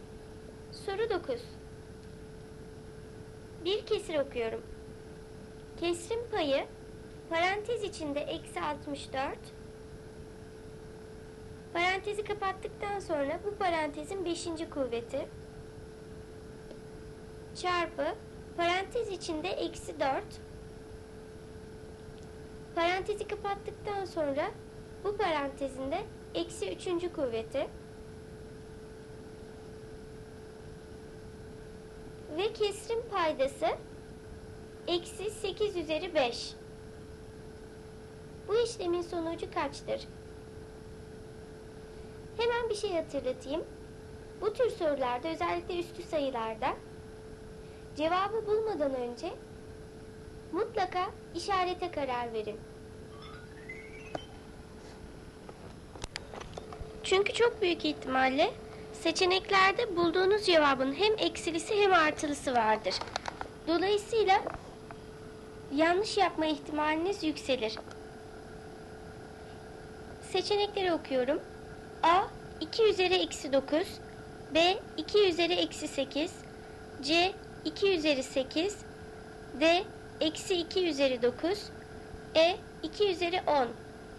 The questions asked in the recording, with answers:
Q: Bu işlemin sonucu kaçtır?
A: Doğru cevap D eksi 2 üzeri 9.